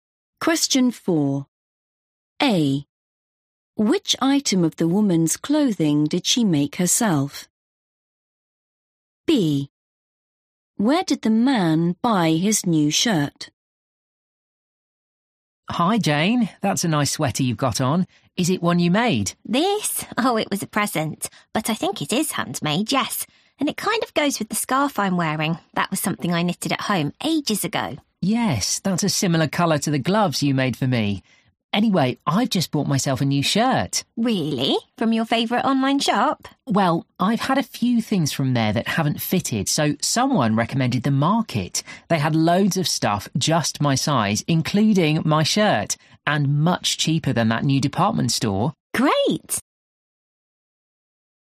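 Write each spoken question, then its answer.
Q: Which item of the woman's clothing did she make herself?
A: the scarf

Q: Where did the man buy his new shirt?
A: The Market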